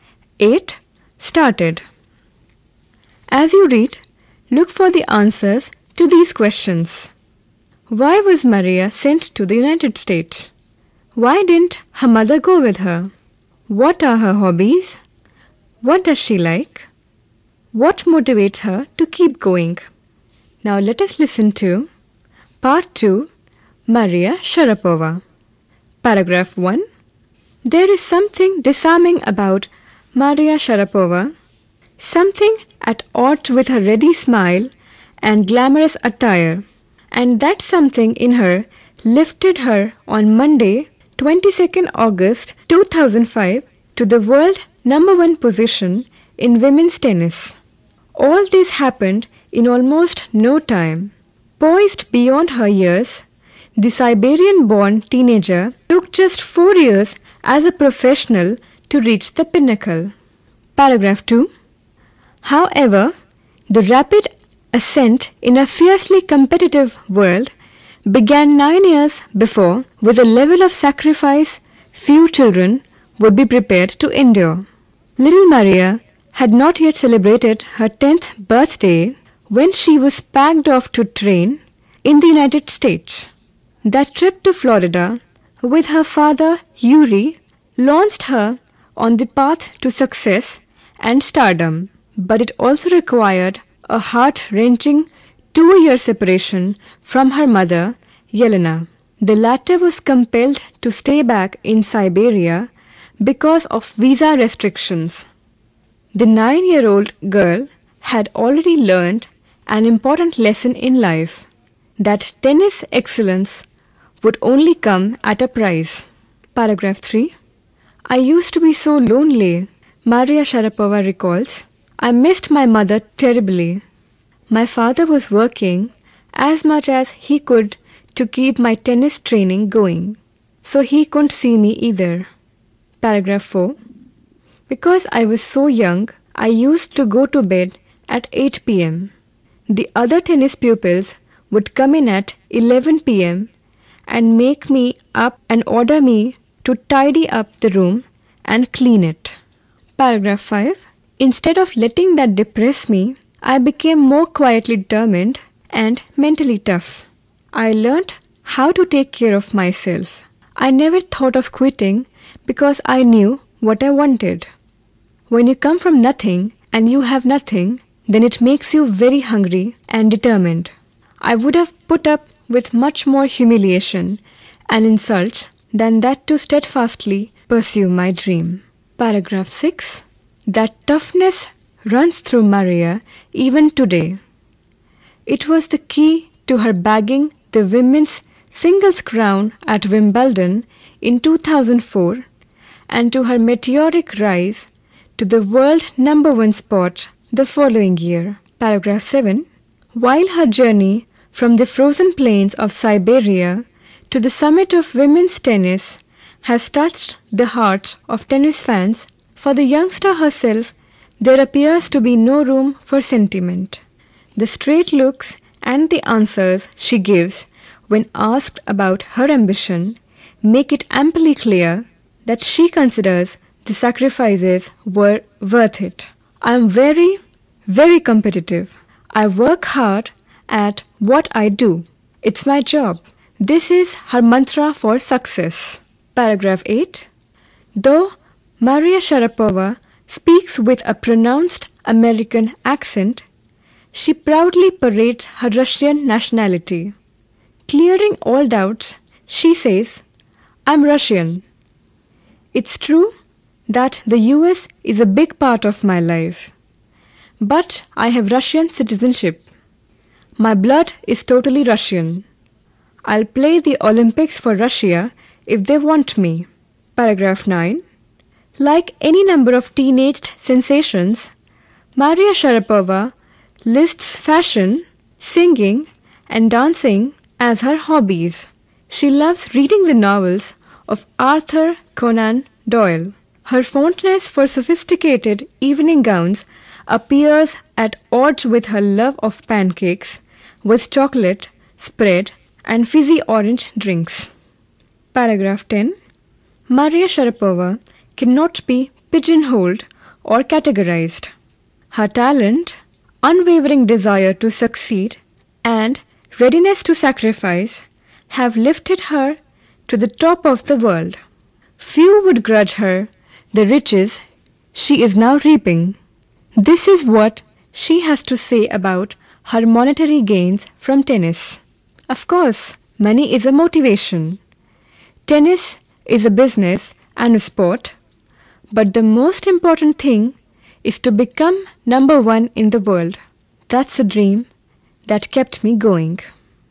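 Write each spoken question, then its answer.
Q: Why was Maria sent to the United States?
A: To train in tennis.

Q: Why didn't her mother go with her?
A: Because of visa restrictions.

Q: What are her hobbies? What does she like?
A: Fashion, singing and dancing; she likes Arthur Conan Doyle's novels, evening gowns, pancakes with chocolate spread and fizzy orange drinks.

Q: What motivates her to keep going?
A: Her dream of becoming number one in the world.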